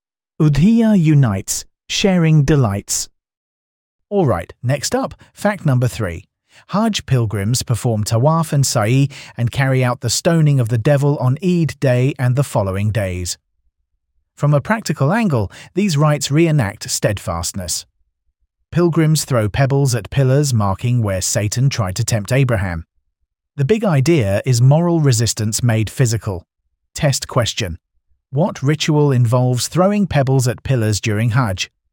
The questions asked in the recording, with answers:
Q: What ritual involves throwing pebbles at pillars during Hajj?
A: Stoning of the devil.